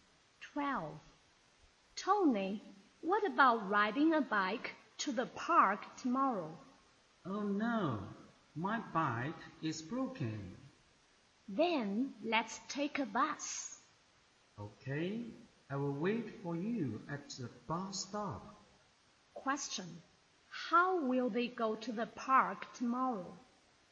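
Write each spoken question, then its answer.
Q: How will they go to the park tomorrow?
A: By bus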